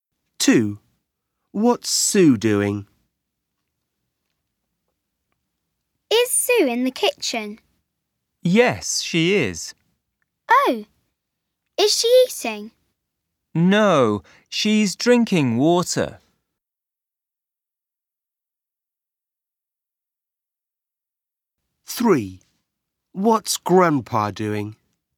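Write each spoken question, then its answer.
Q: What's Sue doing?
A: drinking water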